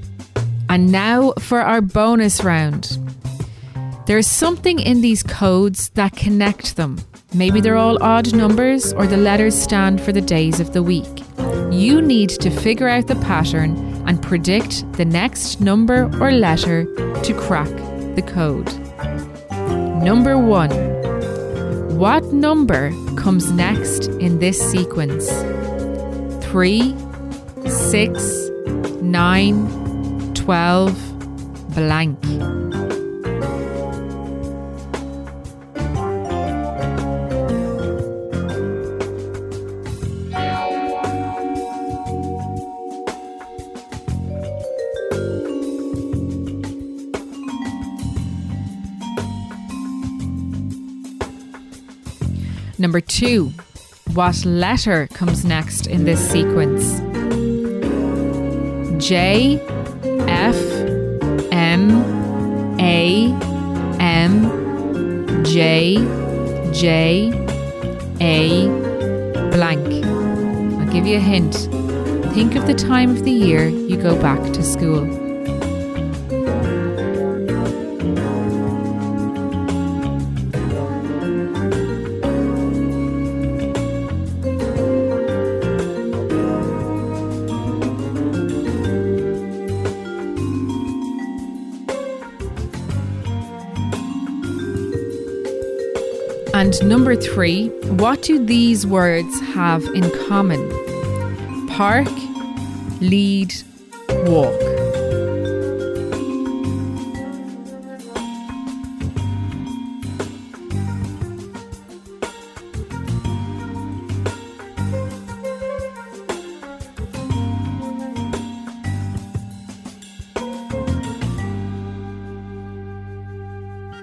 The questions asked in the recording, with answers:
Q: What number comes next in this sequence?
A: The answer is 15.

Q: what letter comes next in this sequence?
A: The answer is S, because all of those letters stand for the months of the year.